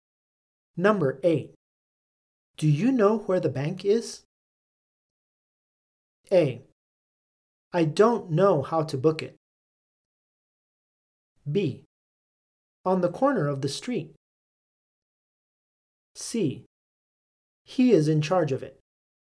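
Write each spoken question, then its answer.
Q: Do you know where the bank is?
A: B: On the corner of the street.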